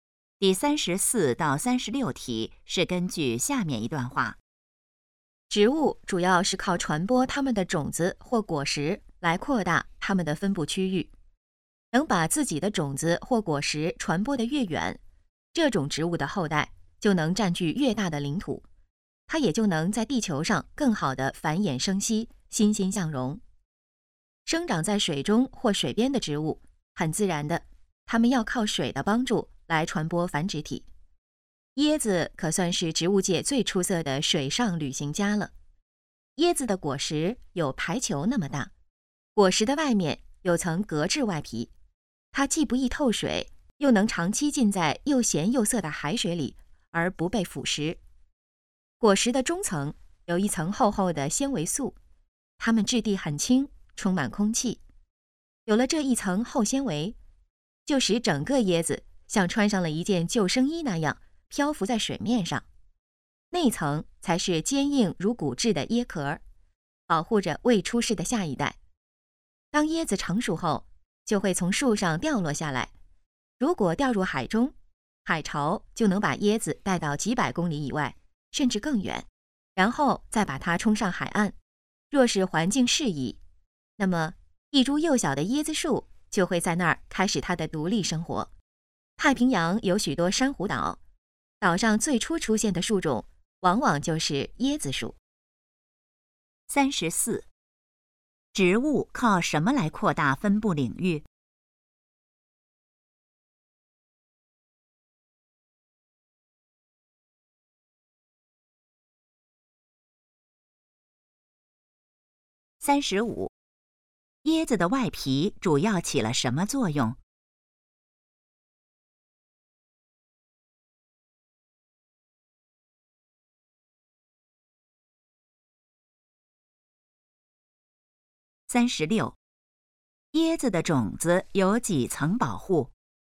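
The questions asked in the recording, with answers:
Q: 植物靠什么来扩大分布领域?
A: 传播种子或果实

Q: 椰子的外皮主要起了什么作用?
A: 不易透水,耐海水腐蚀

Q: 椰子的种子有几层保护?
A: 三层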